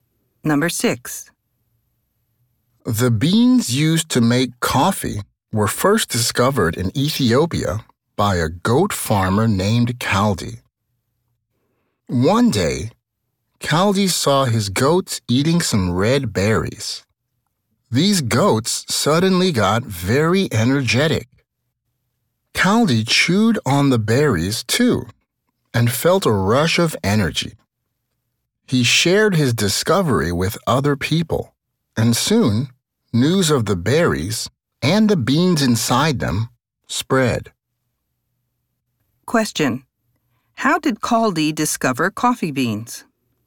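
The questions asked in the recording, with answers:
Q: How did Kaldi discover coffee beans?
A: He saw his goats eating the red berries and becoming energetic, then tried them himself.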